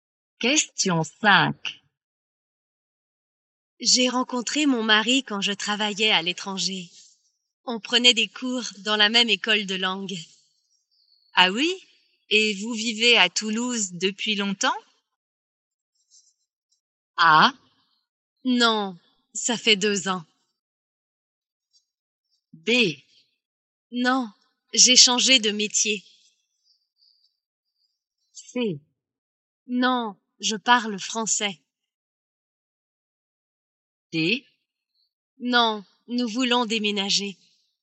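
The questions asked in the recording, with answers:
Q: Et vous vivez à Toulouse depuis longtemps?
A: A: Non, ça fait 2 ans.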